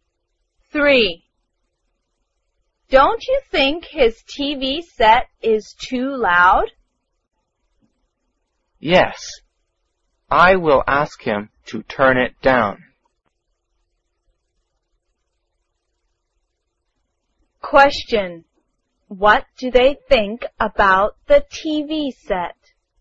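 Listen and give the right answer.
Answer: It is too loud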